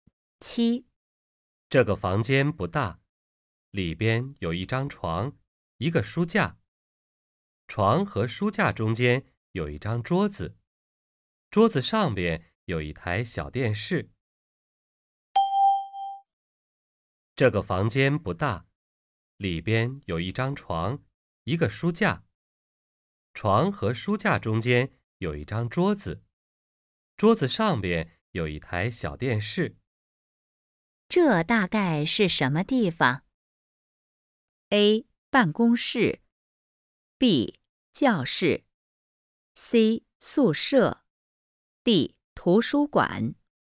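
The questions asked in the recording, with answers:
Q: 这大概是什么地方?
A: C: 宿舍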